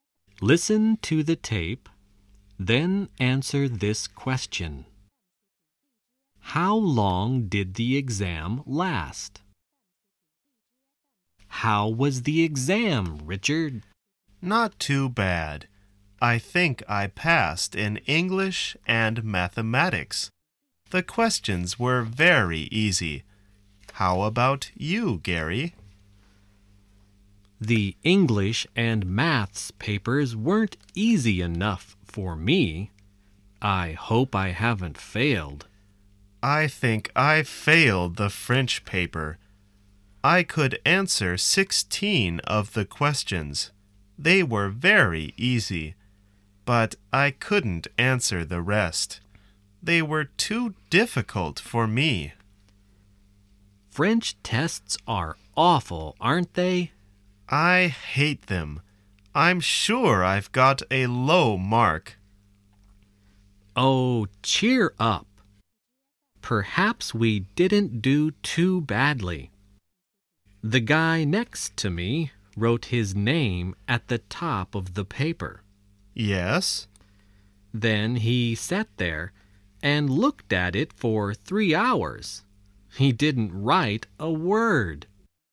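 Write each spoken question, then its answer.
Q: How long did the exam last?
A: 3 hours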